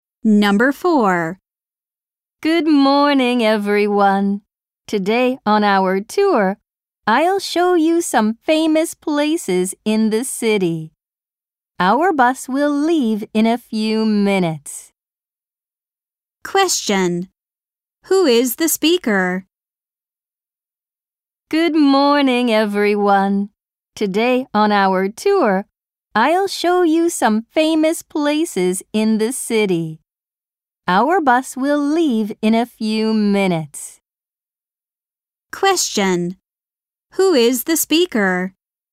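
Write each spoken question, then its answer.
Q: Who is the speaker?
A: A tour guide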